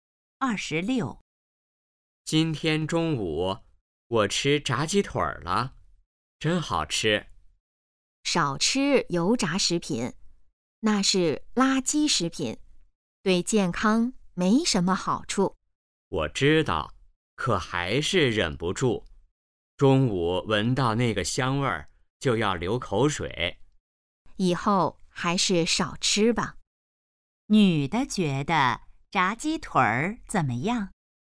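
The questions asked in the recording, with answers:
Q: 女的觉得炸鸡腿儿怎么样?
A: 是垃圾食品,对健康不好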